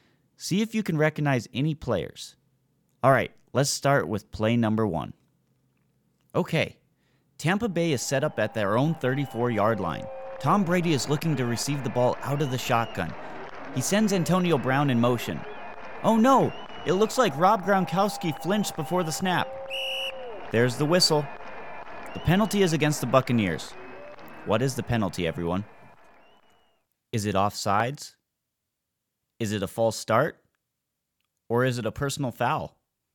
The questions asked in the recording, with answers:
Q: What is the penalty, everyone?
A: If you said false start, you are correct.